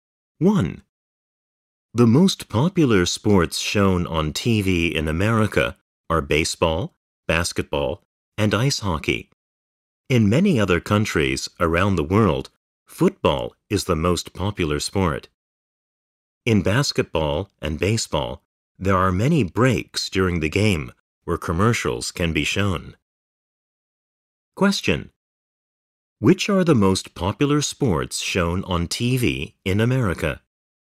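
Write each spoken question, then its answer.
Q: Which are the most popular sports shown on TV in America?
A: Baseball, basketball, and ice hockey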